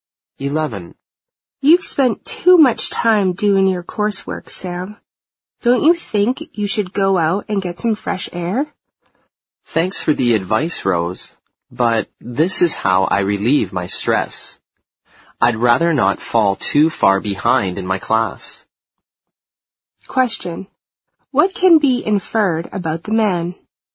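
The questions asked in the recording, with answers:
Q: What can be inferred about the man?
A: He relieves stress by doing his coursework and doesn't want to fall behind in class.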